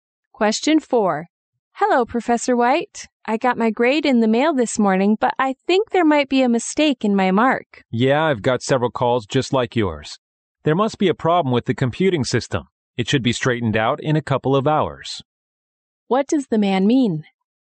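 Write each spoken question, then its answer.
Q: What does the man mean?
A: A computer problem caused the grade errors, and it will be fixed soon.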